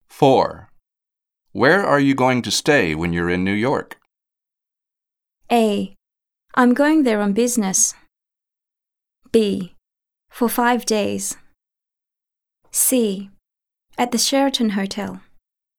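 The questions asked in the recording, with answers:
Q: Where are you going to stay when you're in New York?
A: C: At the Sheraton Hotel.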